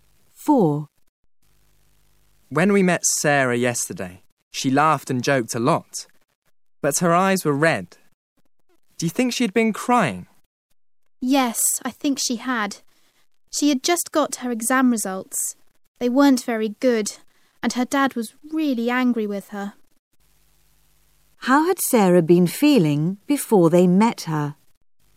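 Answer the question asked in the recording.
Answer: Sad (she had been crying)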